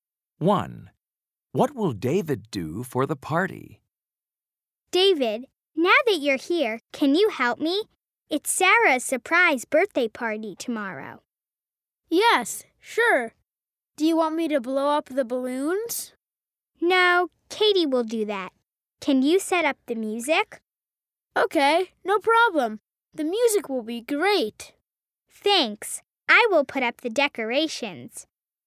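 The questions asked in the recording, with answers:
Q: What will David do for the party?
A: Set up the music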